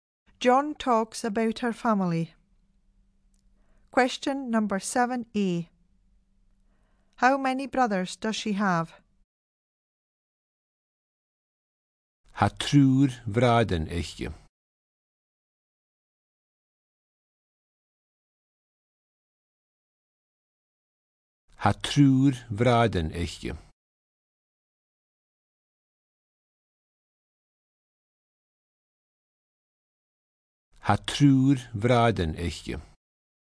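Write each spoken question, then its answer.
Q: How many brothers does she have?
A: Three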